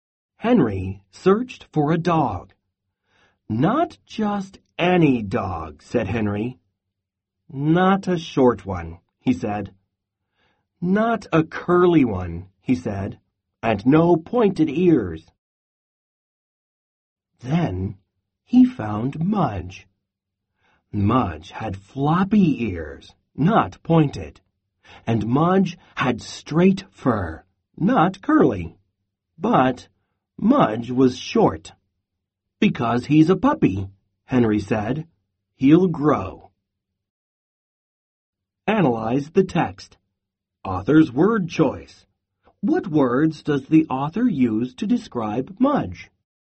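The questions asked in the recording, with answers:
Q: What words does the author use to describe Mudge?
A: Floppy ears, straight fur, short (a puppy)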